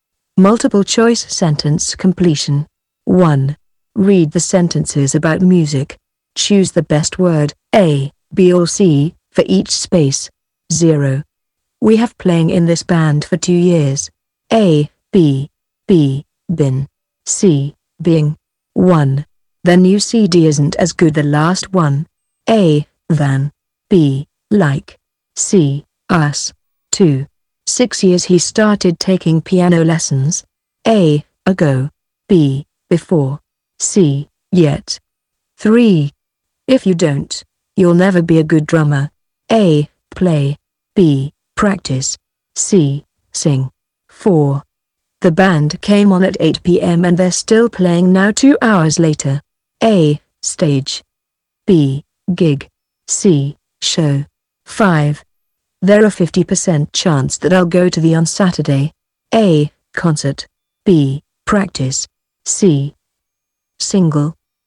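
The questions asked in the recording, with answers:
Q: The new CD isn't as good the last one.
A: C: as

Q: 6 years he started taking piano lessons.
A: A: ago

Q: If you don't, you'll never be a good drummer.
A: B: practice

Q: The band came on at 8 p.m.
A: A: stage

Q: There are 50% chance that I'll go to the on Saturday.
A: A: concert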